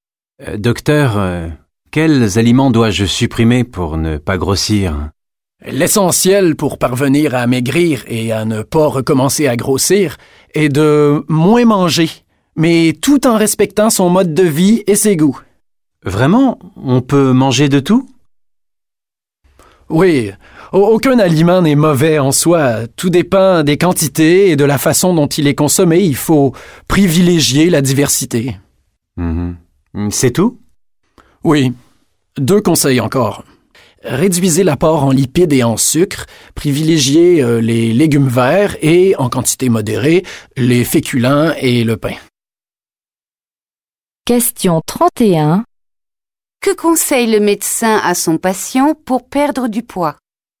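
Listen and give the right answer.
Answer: Manger moins, de tout et de façon variée, en réduisant les graisses et le sucre et en privilégiant les légumes verts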